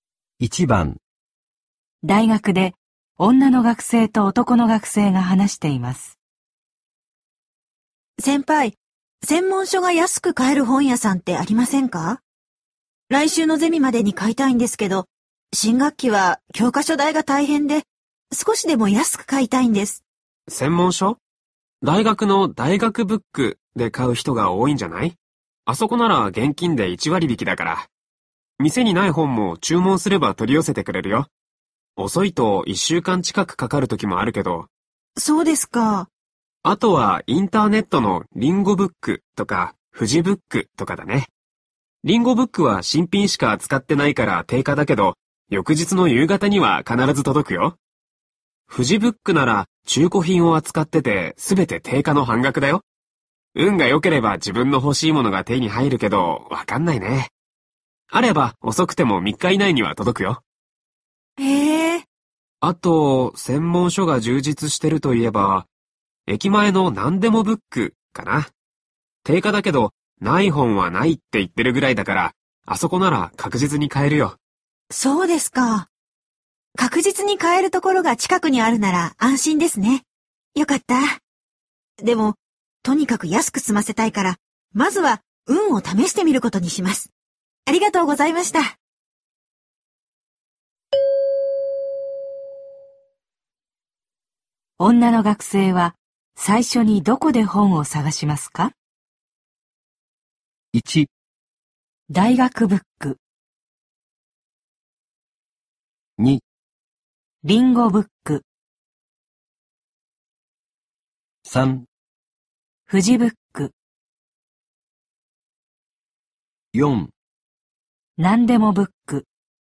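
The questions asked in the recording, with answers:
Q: 女の学生は最初にどこで本を探しますか?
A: 3: フジブック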